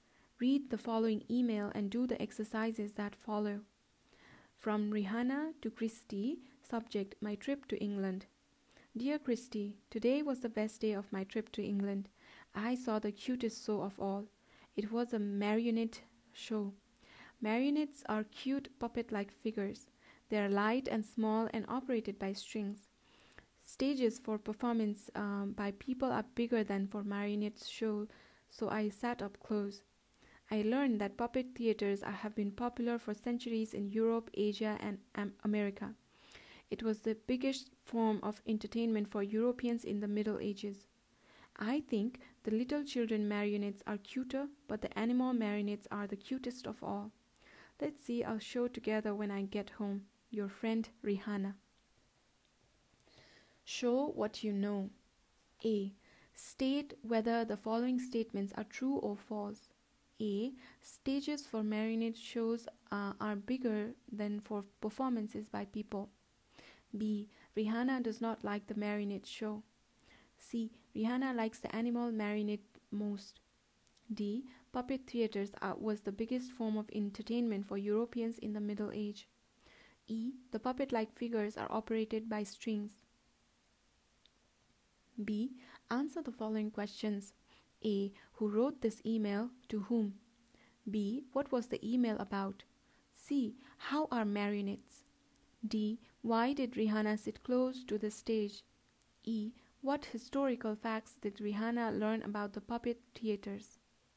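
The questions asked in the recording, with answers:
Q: Stages for marionette shows uh, are bigger than for performances by people.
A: False

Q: Rihanna does not like the marionette show.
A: False

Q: Rihanna likes the animal marionette most.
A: True

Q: Puppet theatres are, was the biggest form of entertainment for Europeans in the Middle Age.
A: True

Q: The puppet like figures are operated by strings.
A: True

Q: Who wrote this email to whom?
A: Rihanna wrote it to Christy

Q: What was the email about?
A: Her trip to England and a marionette show

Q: Why did Rihanna sit close to the stage?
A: Marionette stages are smaller than stages for performances by people

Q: What historical facts did Rihanna learn about the puppet theaters?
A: They have been popular for centuries in Europe, Asia and America, and were the biggest form of entertainment for Europeans in the Middle Ages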